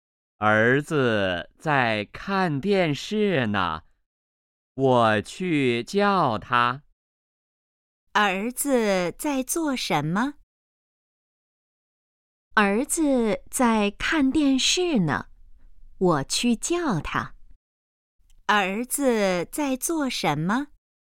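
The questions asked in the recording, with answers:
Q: 儿子在做什么?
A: 看电视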